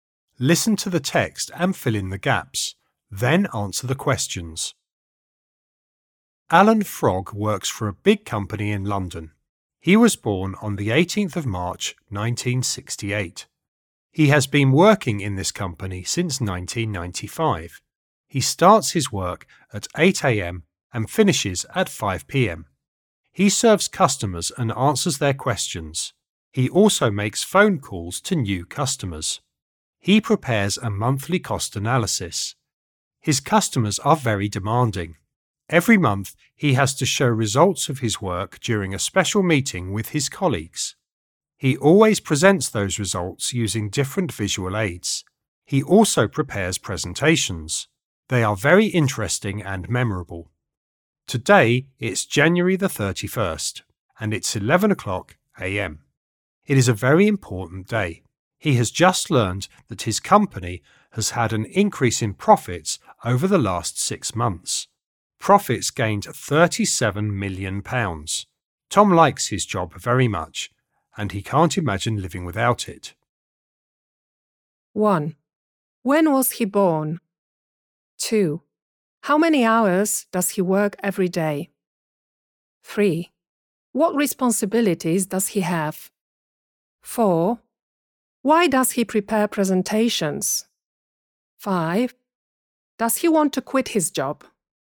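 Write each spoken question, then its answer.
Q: When was he born?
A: On the 18th of March, 1968

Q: How many hours does he work every day?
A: 9 hours (8 a.m. to 5 p.m.)

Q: What responsibilities does he have?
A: He serves customers, answers their questions, makes phone calls to new customers, prepares a monthly cost analysis and presentations

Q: Does he want to quit his job?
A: No, he likes his job very much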